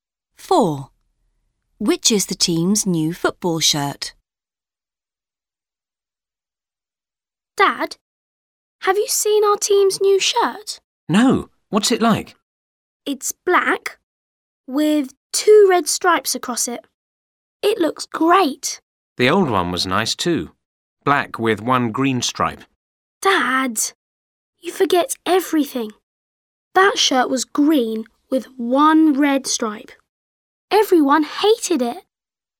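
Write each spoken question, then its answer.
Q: Which is the team's new football shirt?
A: Black with 2 red stripes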